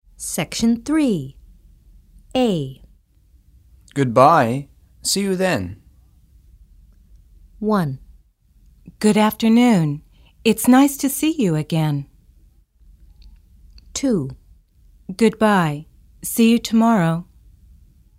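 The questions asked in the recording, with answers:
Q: Goodbye. See you then.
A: 2: Goodbye. See you tomorrow.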